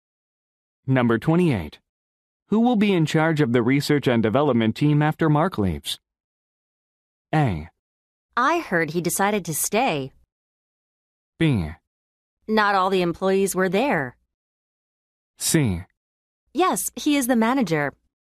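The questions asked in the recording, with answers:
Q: Who will be in charge of the research and development team after Mark leaves?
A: A: I heard he decided to stay.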